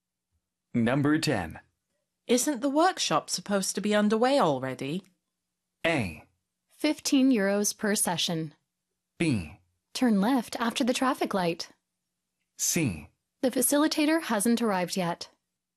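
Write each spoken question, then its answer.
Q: Isn't the workshop supposed to be underway already?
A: C: The facilitator hasn't arrived yet.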